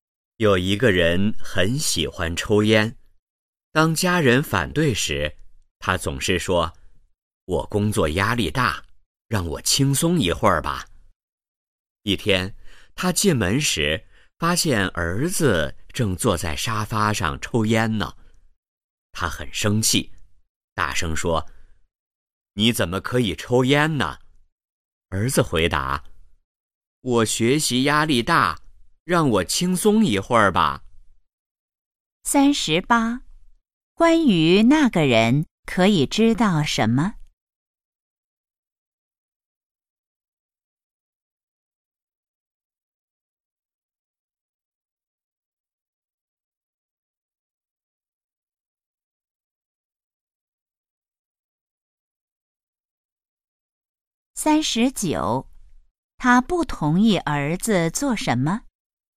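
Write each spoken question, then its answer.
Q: 他不同意儿子做什么?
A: 抽烟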